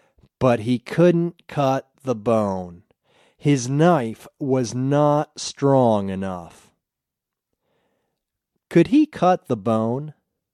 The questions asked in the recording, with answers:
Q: Could he cut the bone?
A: No, he couldn't cut the bone.